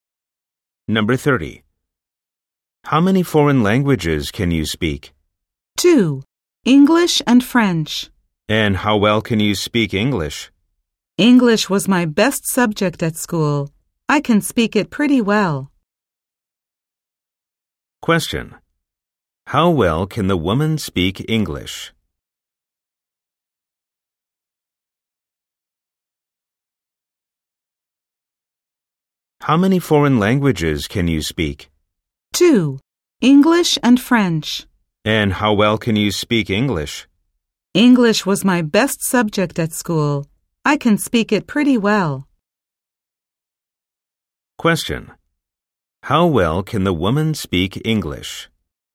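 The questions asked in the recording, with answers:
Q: How well can the woman speak English?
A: Pretty well.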